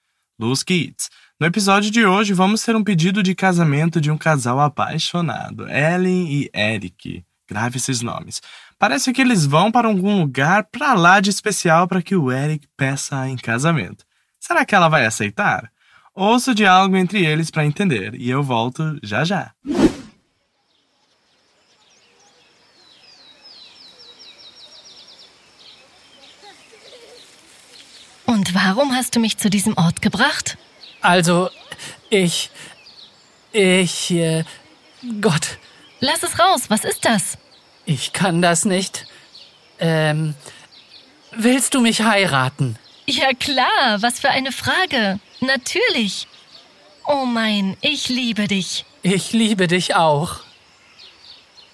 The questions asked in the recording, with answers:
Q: Será que ela vai aceitar?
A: Bom, talvez você tenha entendido que sim quando ela disse ja klar. E você está certo.